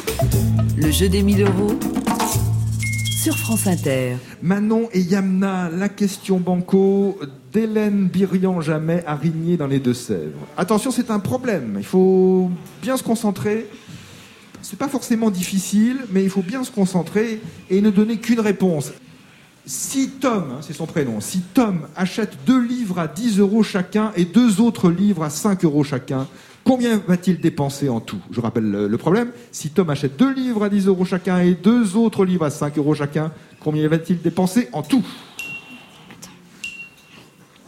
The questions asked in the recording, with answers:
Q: Si Tom achète deux livres à 10 euros chacun et deux autres livres à 5 euros chacun, Combien va-t-il dépenser en tout?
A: 30 euros, banco gagné!